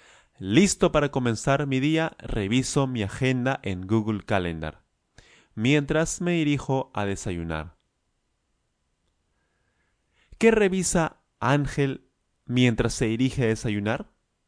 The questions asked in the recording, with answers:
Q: ¿Qué revisa Ángel mientras se dirige a desayunar?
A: Él revisa su agenda, su agenda en Google Calendar.